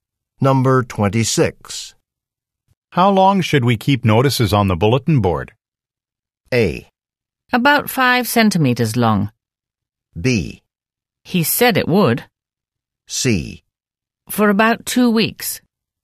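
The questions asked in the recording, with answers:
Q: How long should we keep notices on the bulletin board?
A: C: For about 2 weeks.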